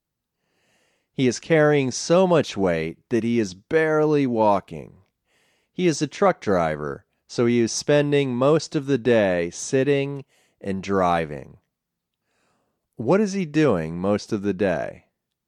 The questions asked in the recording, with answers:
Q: What is he doing most of the day?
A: He is sitting and driving most of the day.